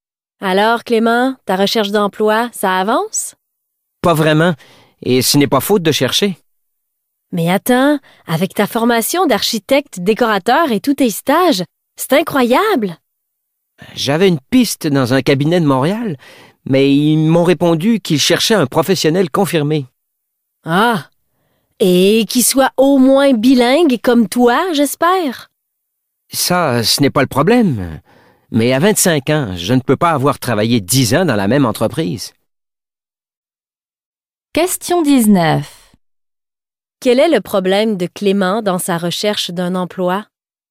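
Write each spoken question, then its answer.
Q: Quel est le problème de Clément dans sa recherche d'un emploi?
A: Il manque d'expérience professionnelle (on cherche un professionnel confirmé).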